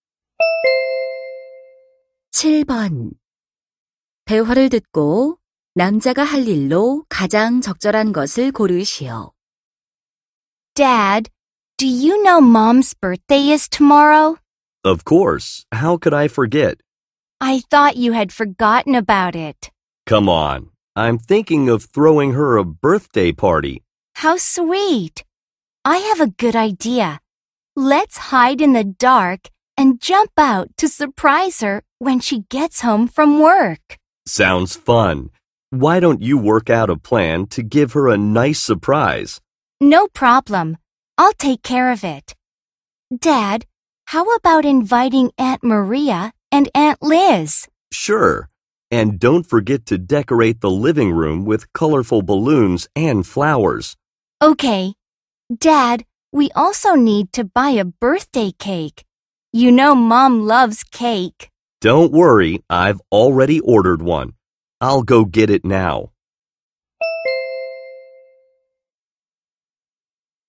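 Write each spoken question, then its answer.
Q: 대화를 듣고 남자가 할 일로 가장 적절한 것을 고르시오.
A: 주문한 생일 케이크 가지러 가기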